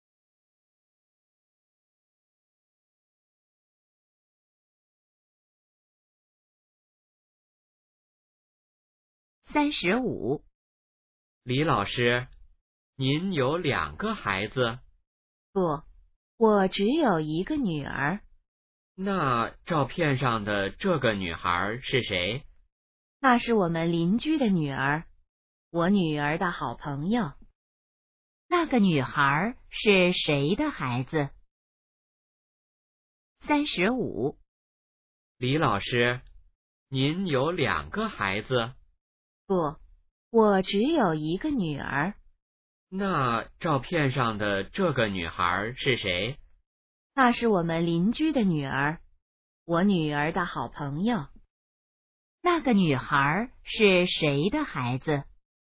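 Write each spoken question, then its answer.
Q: 那个女孩是谁的孩子?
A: 邻居的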